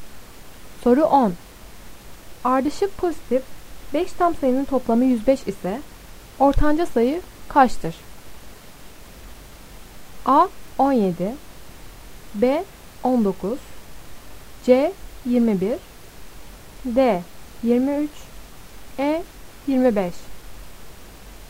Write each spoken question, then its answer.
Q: Ardışık pozitif 5 tam sayının toplamı 105 ise ortanca sayı kaçtır?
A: Doğru cevap C 21.